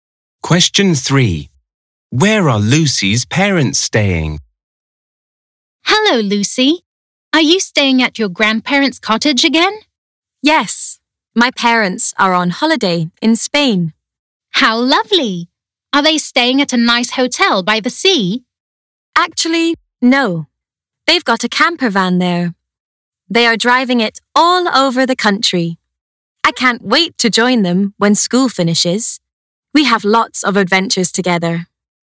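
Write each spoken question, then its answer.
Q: Where are Lucy's parents staying?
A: in a camper van in Spain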